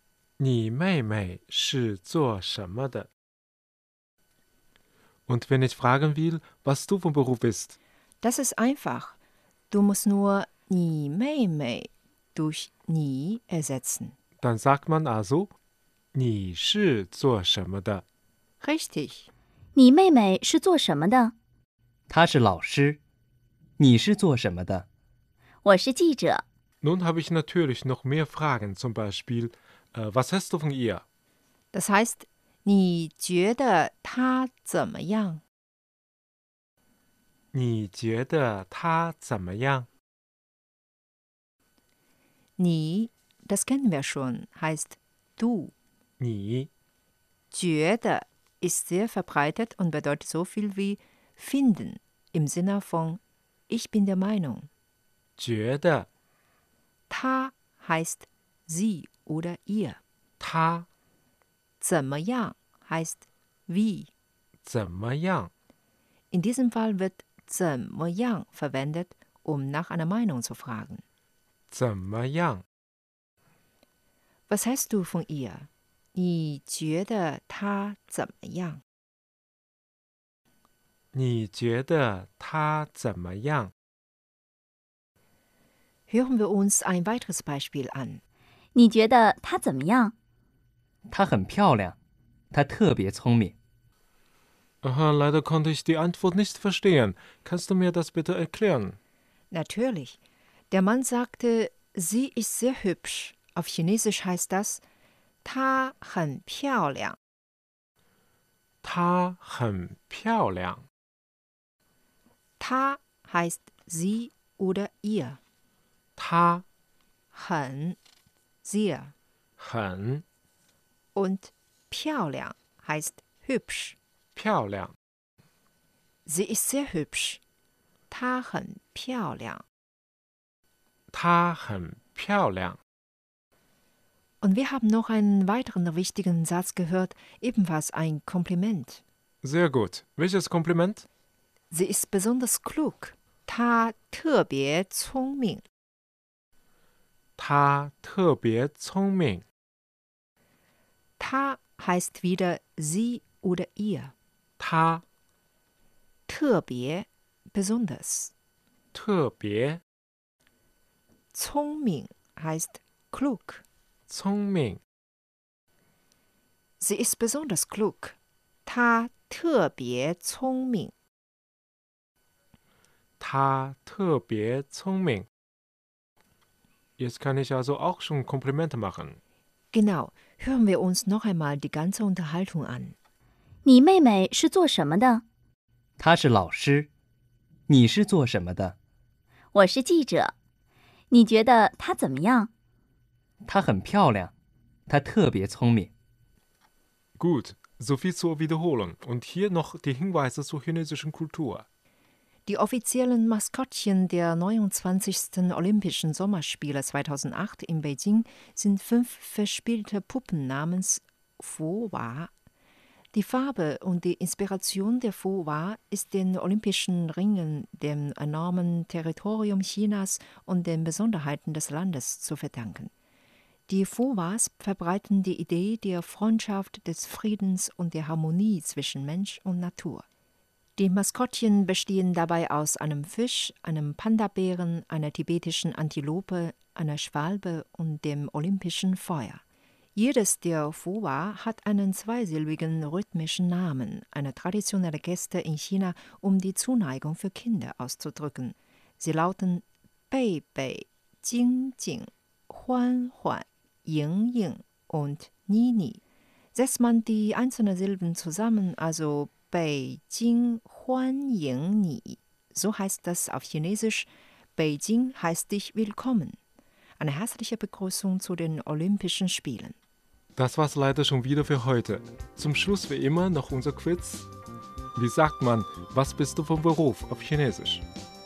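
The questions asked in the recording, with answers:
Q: Wie sagt man, was bist du vom Beruf auf Chinesisch?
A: Ni shi zuo shenme de? (你是做什么的?)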